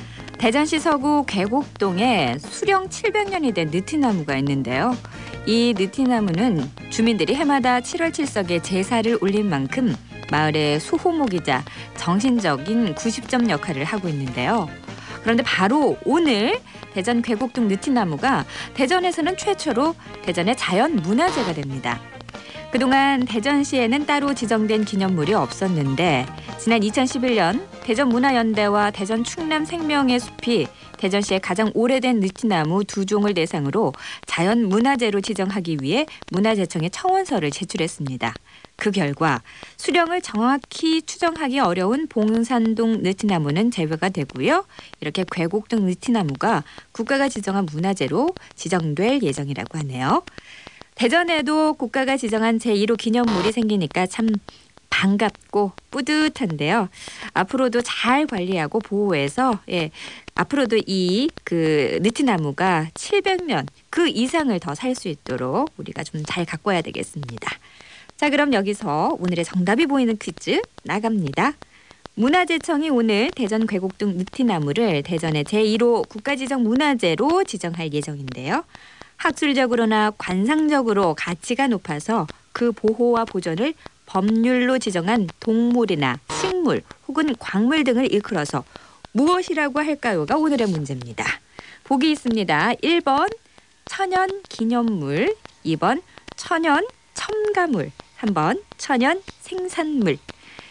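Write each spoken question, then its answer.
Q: 학술적으로나 관상적으로 가치가 높아서 그 보호와 보존을 법률로 지정한 동물이나 식물 혹은 광물 등을 일컬어서 무엇이라고 할까요가 오늘의 문제입니다.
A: 1번: 천연 기념물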